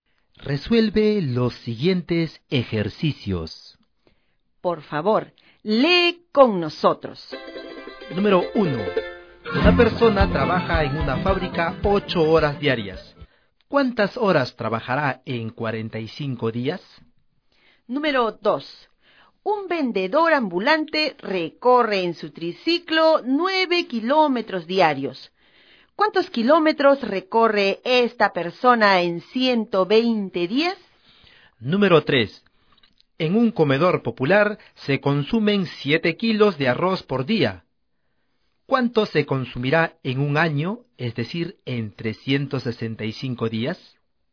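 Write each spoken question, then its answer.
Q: ¿Cuántas horas trabajará en 45 días?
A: 360 horas

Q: ¿Cuántos kilómetros recorre esta persona en 120 días?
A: 1080 kilómetros

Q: ¿Cuánto se consumirá en un año, es decir, en 365 días?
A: 2555 kilos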